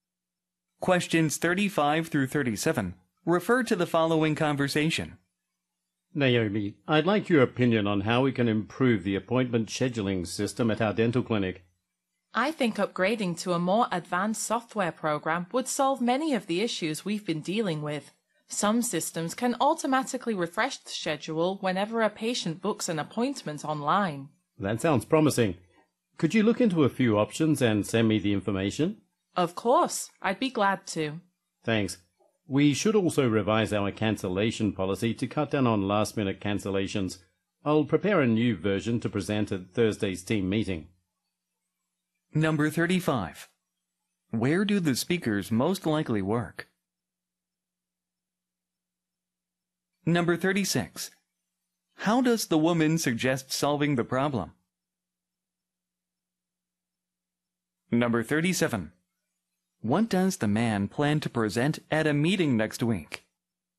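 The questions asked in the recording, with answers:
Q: Where do the speakers most likely work?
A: At a dental clinic

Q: How does the woman suggest solving the problem?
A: By upgrading to more advanced scheduling software

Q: What does the man plan to present at a meeting next week?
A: A revised cancellation policy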